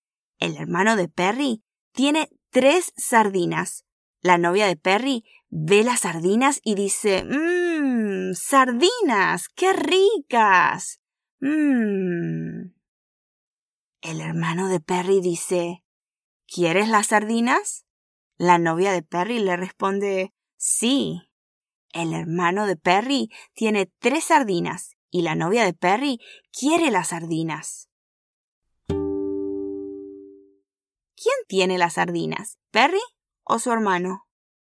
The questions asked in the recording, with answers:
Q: ¿Quién tiene las sardinas? ¿Perry o su hermano?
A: Muy bien, el hermano de Perry tiene las sardinas y la novia de Perry las quiere.